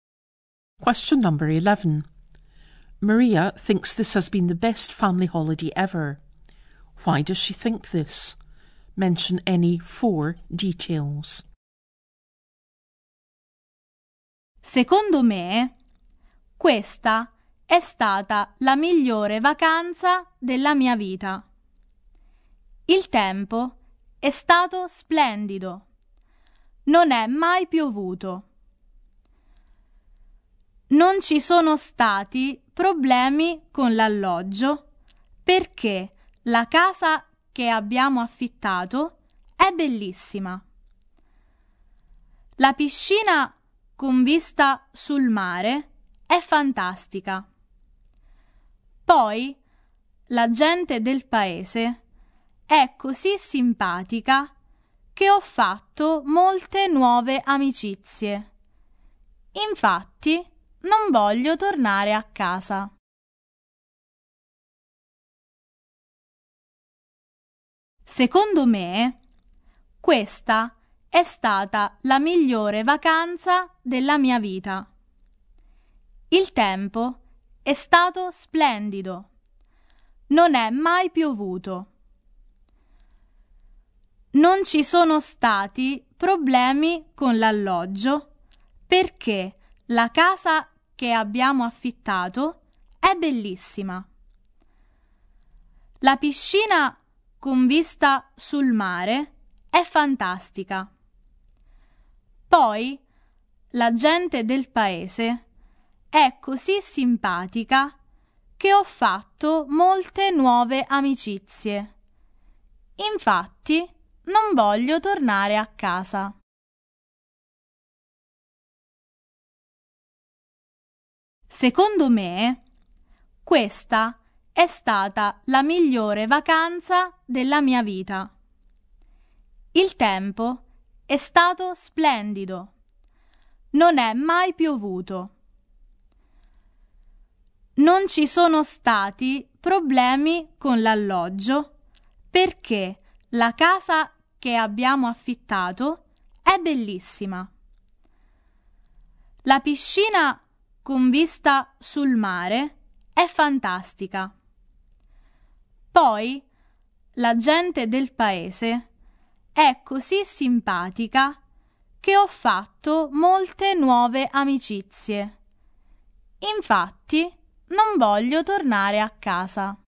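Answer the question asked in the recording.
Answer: The weather was lovely and it never rained; no problems with the accommodation because the rented house is beautiful; the pool with a sea view is fantastic; the local people are so nice that she made lots of new friends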